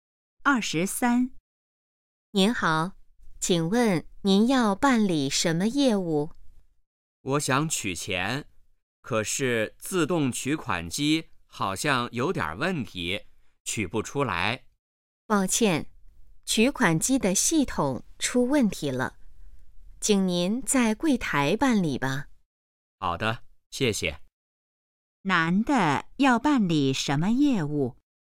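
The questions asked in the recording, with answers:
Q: 男的要办理什么业务?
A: 取钱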